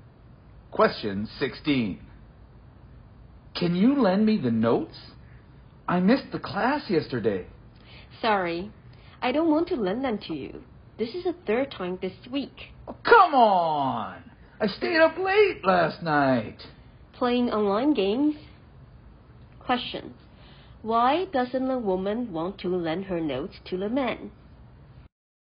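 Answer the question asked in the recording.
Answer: Because he keeps missing class (third time this week), apparently from staying up late playing online games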